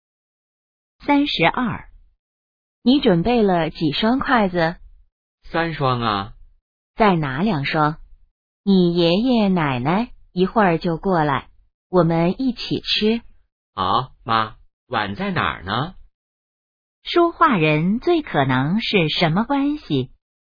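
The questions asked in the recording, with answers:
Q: 说话人最可能是什么关系?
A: 母子(母女)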